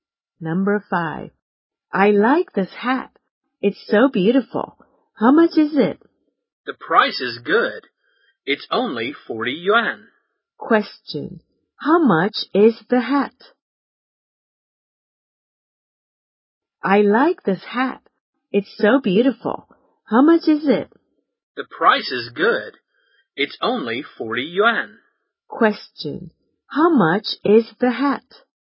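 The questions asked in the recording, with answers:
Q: How much is the hat?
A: 40 yuan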